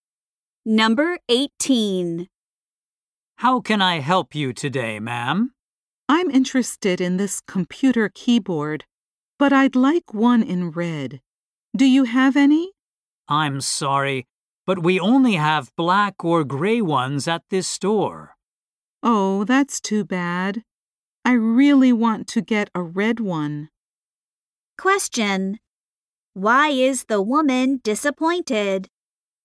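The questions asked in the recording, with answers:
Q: Why is the woman disappointed?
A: The store has no red keyboards.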